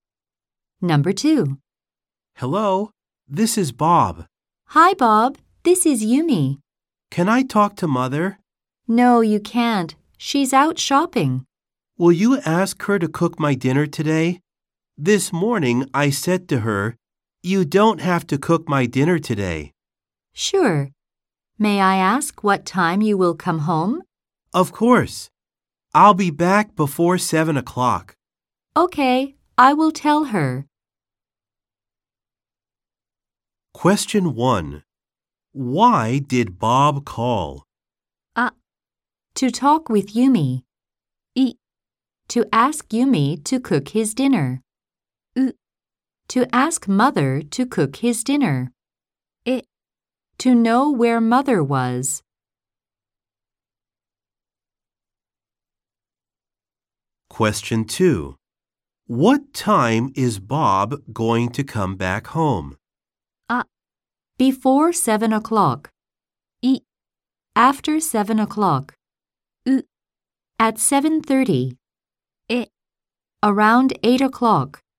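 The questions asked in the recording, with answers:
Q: Why did Bob call?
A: う: To ask Mother to cook his dinner.

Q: What time is Bob going to come back home?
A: あ: Before 7 o'clock.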